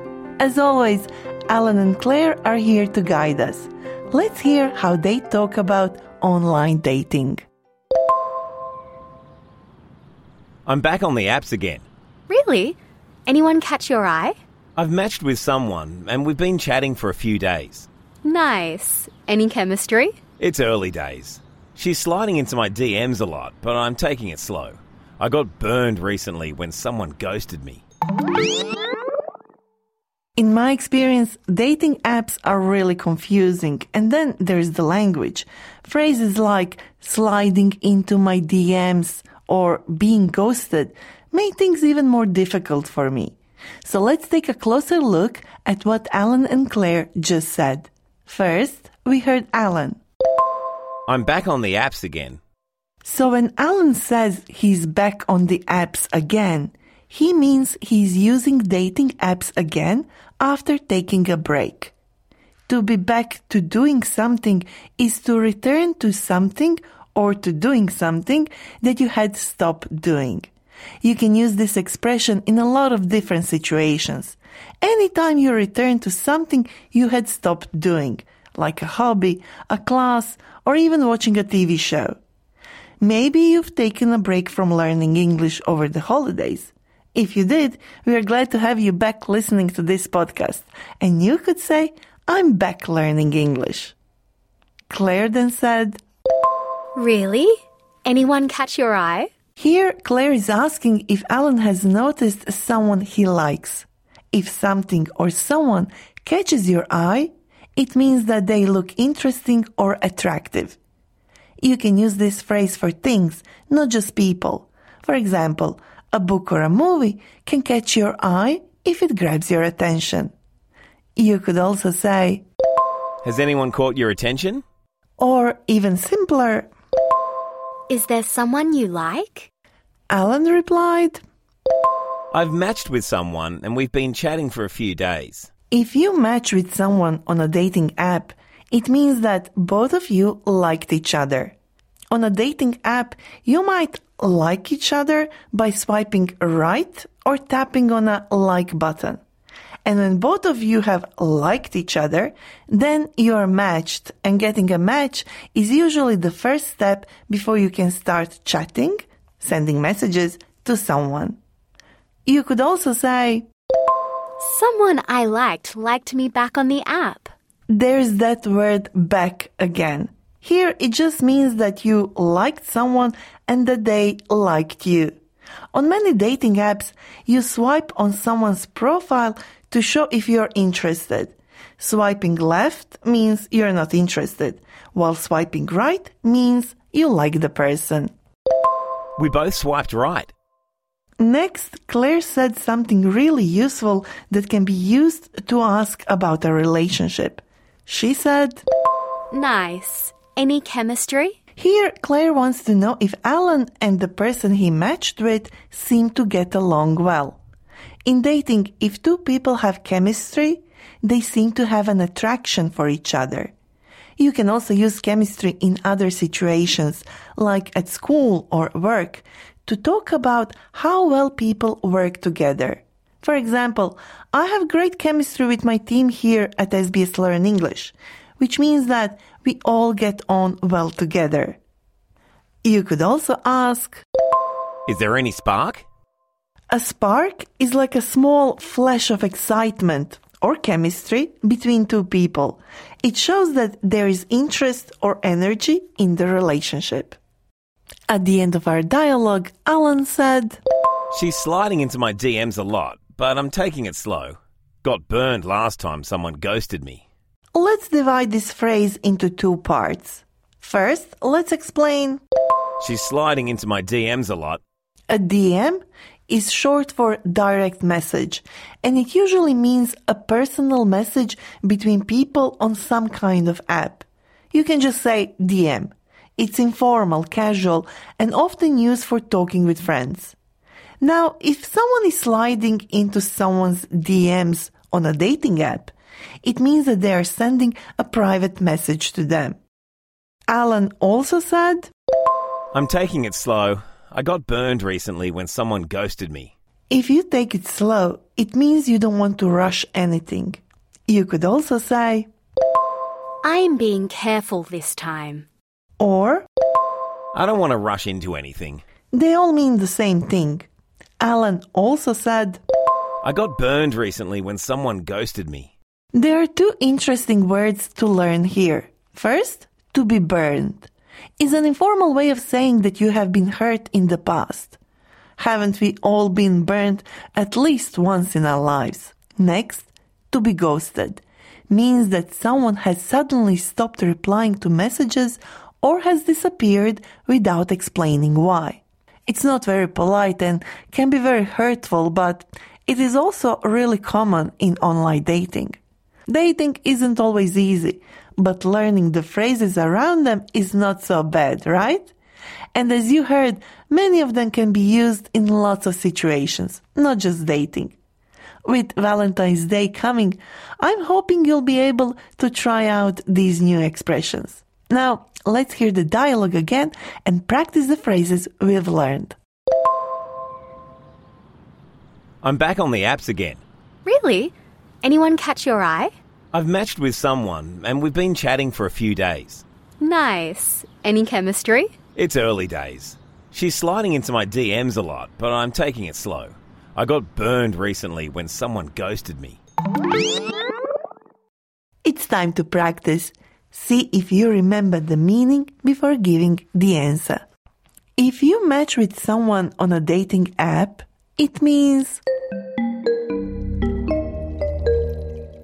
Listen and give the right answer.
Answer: if you match with someone on a dating app, it means that both of you liked each other.